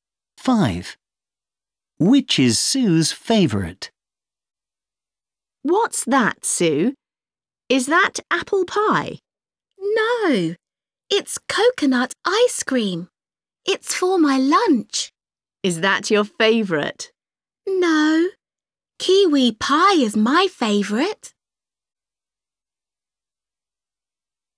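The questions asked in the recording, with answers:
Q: Which is Sue's favourite?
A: kiwi pie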